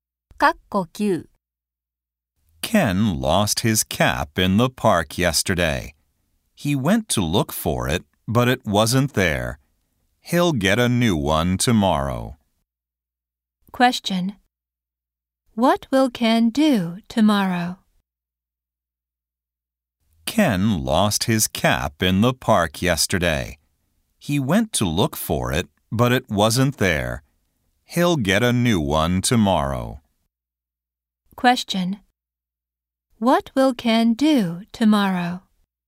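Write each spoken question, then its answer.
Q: What will Ken do tomorrow?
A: Get a new cap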